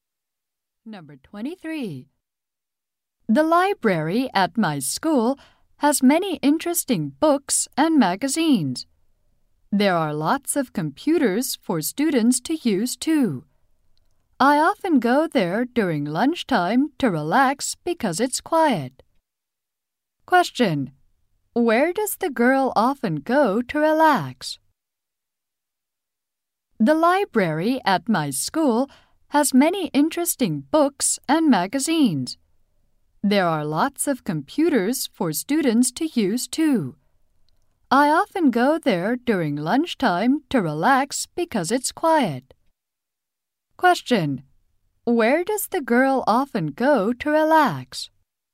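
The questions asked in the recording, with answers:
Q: Where does the girl often go to relax?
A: The school library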